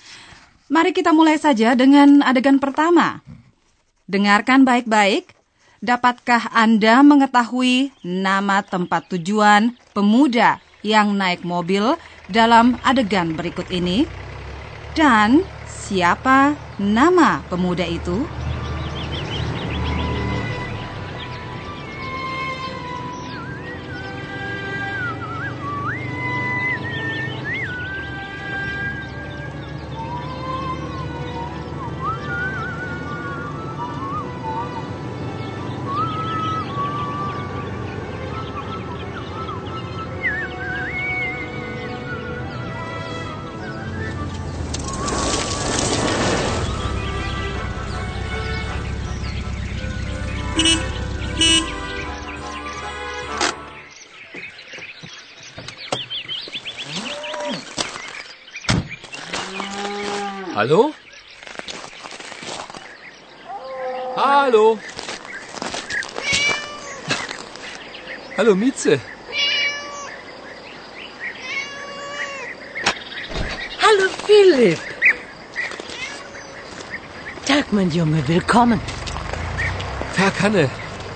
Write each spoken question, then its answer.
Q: Dan siapa nama pemuda itu?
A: Barangkali Anda sudah mengetahui pula bahwa tokoh kita bernama Philip.